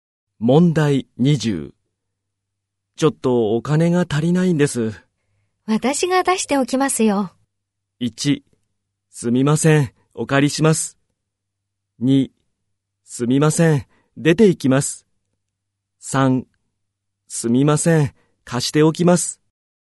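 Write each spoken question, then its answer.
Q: ちょっとお金が足りないんです。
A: 3: すみません、お借りします。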